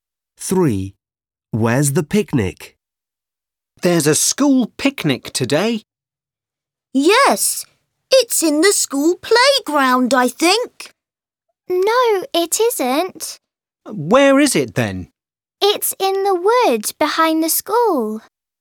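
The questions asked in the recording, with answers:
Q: Where's the picnic?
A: in the woods behind the school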